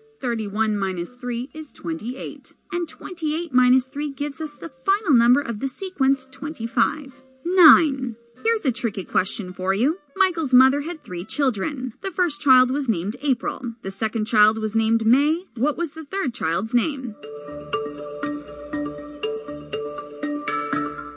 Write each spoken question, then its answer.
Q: What was the third child's name?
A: The answer is Michael.